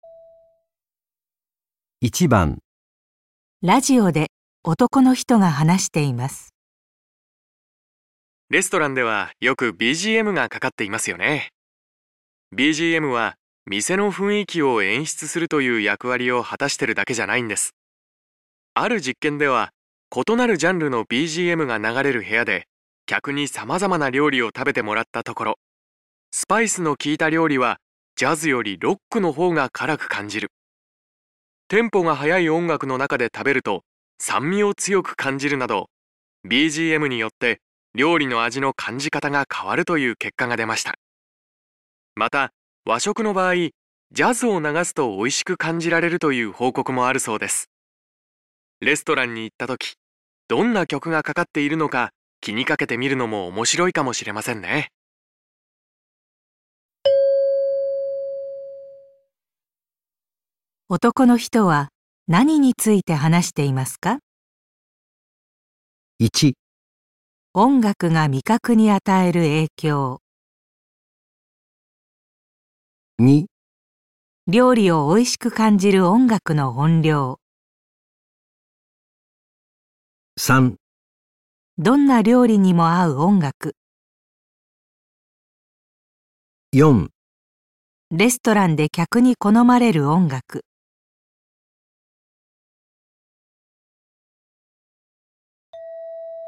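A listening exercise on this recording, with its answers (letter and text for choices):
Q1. 男の人は何について話していますか。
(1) 音楽が味覚に与える影響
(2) 料理をおいしく感じる音楽の音量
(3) どんな料理にも合う音楽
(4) レストランで客に好まれる音楽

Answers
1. (1) 音楽が味覚に与える影響

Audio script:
BGM は店の雰囲気を演出するという役割を果たしてるだけじゃないんです。 ある実験では異なるジャンルのBGMが流れる部屋で客に様々な料理を食べてもらった ところ、スパイスの効いた料理はジャズよりロックの方が辛く感じる。 テンポが速い音楽の中で食べると酸味を 強く感じるなど、 BGM によって料理の味の感じ方が変わるという結果が出ました。 また、和食の場合、 ジャズを 流すとおいしく感じられるという報告もあるそうです。 レストランに行った時、どんな曲がかかっているのか気に かけてみるのも面白いかもしれませんね。

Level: N1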